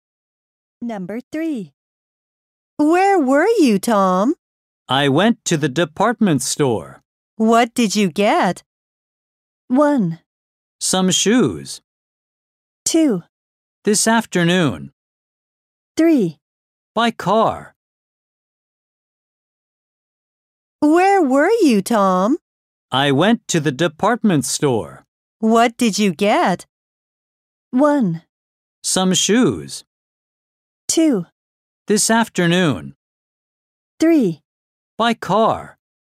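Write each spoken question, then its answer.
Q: What did you get?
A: 1: Some shoes.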